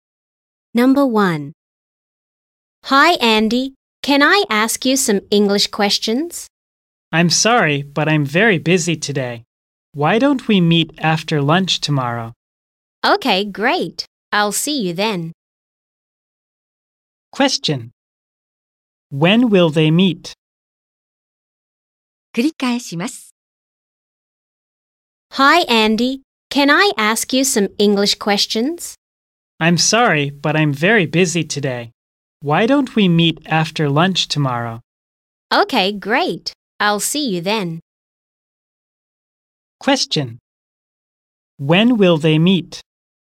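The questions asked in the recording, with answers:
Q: When will they meet?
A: After lunch tomorrow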